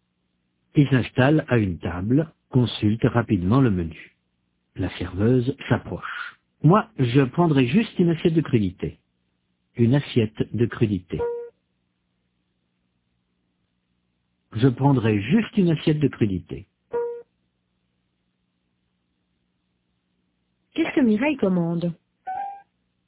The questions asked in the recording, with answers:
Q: Qu'est-ce que Mireille commande ?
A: Une assiette de crudité.